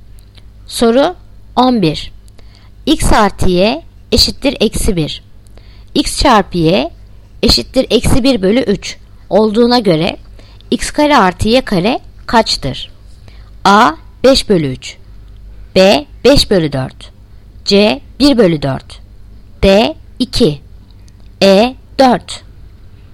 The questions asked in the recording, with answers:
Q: X çarpı Y eşittir eksi 1 bölü 3 olduğuna göre X kare artı Y kare kaçtır?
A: Yanıt Adana 5 bölü 3.